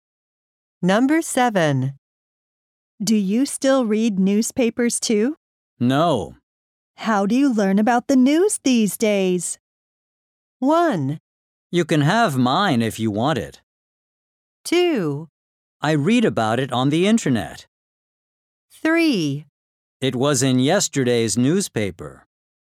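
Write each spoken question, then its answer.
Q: How do you learn about the news these days?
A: 2: I read about it on the internet.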